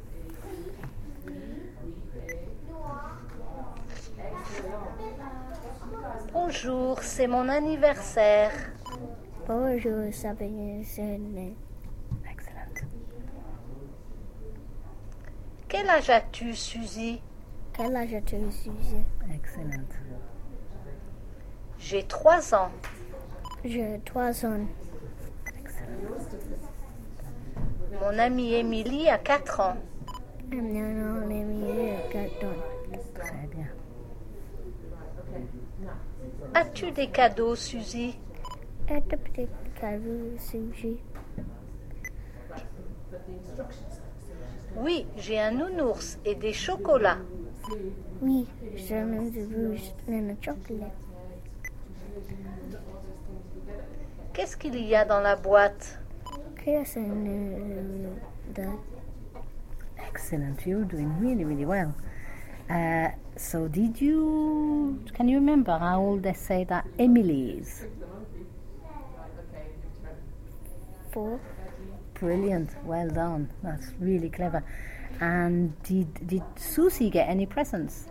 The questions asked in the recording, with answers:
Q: And did Susie get any presents?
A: Yeah, un nounours et des chocolats.